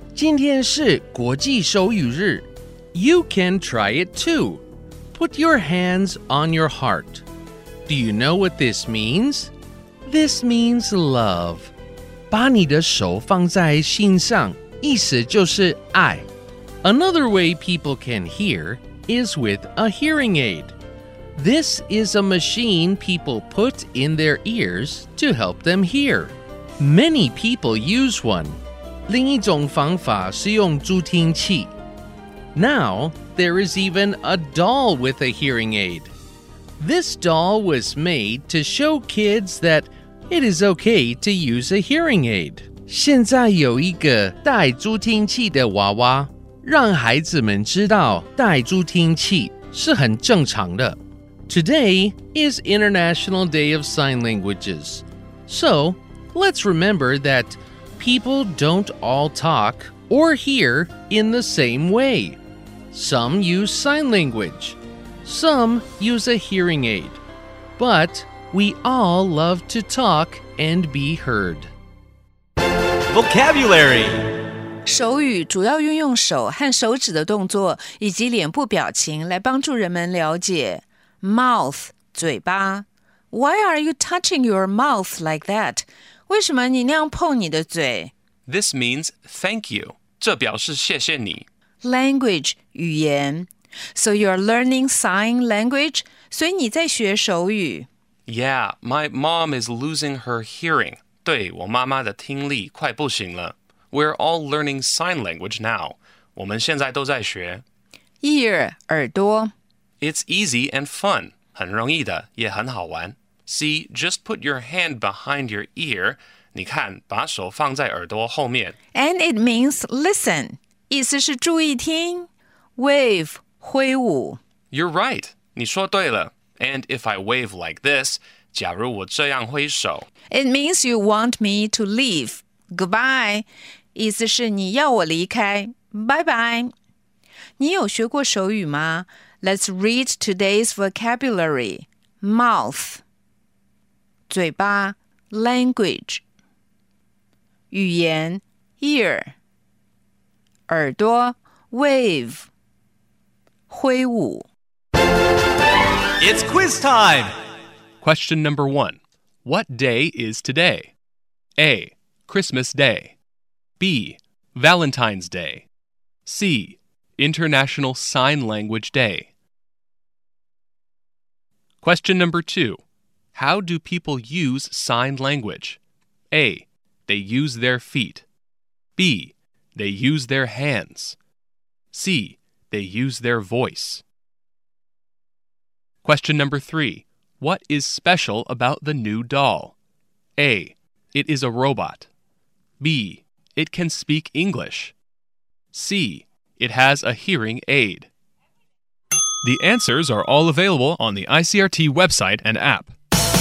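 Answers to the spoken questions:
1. C: International Sign Language Day.
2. B: They use their hands.
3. C: It has a hearing aid.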